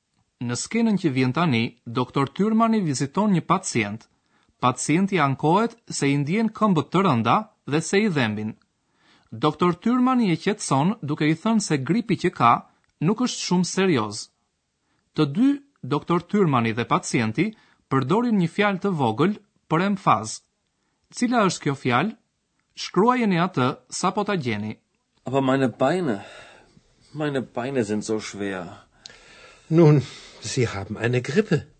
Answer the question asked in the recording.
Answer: Dhe së fundi, fjala e vogël e përdorur për emfaz është zo.